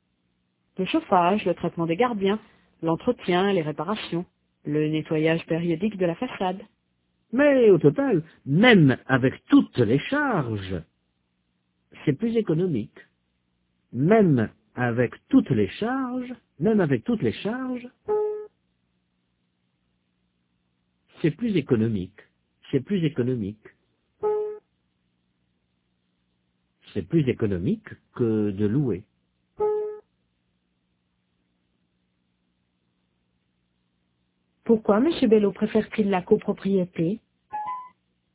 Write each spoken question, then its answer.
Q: Pourquoi M. Bello préfère-t-il la copropriété?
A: Parce que même avec toutes les charges, c'est plus économique que de louer.